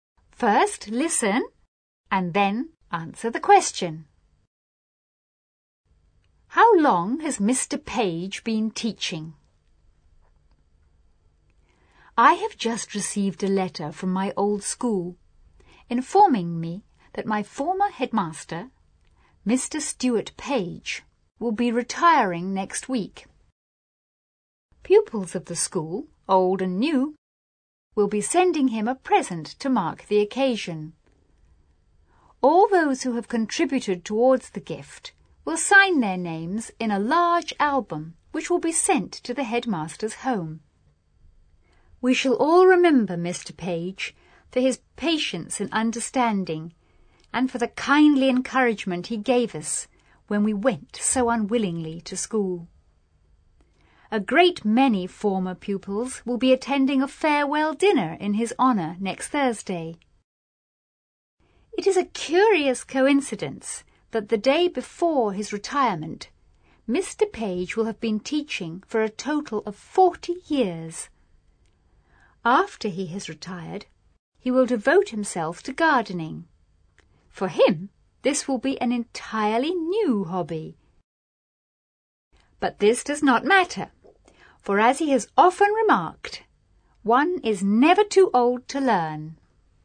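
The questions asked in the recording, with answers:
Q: How long has Mr. Page been teaching?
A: For (almost) 40 years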